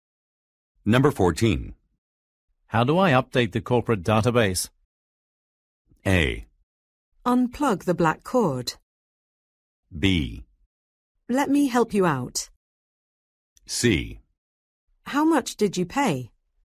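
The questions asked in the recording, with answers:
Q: How do I update the corporate database?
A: B: Let me help you out.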